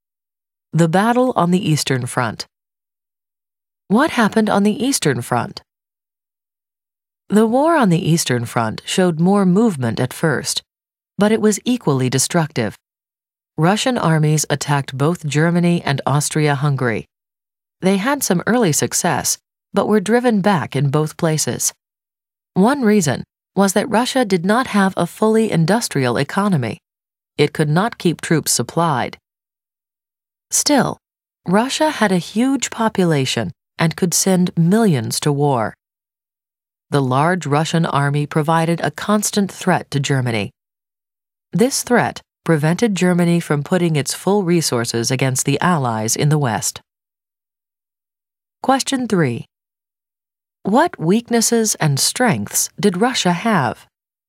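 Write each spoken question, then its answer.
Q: What weaknesses and strengths did Russia have?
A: Weakness: not fully industrialized, could not keep troops supplied; strength: huge population, could send millions to war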